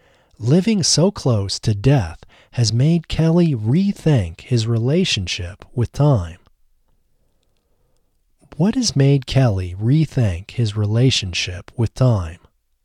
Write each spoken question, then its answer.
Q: What has made Kelly rethink his relationship with time?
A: Living so close to death has made Kelly rethink his relationship with time.